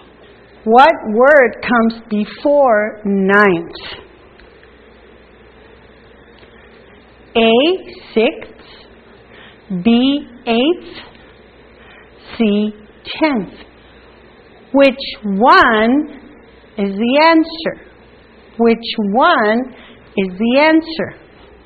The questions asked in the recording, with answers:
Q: What word comes before ninth?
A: Eighth comes before ninth.